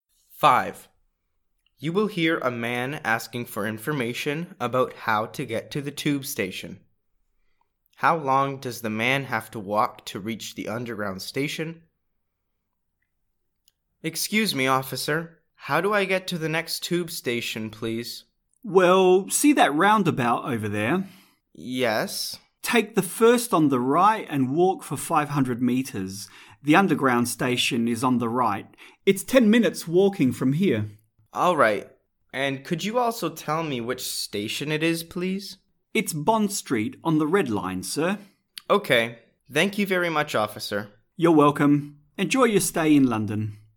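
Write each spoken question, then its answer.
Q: How long does the man have to walk to reach the underground station?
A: 10 minutes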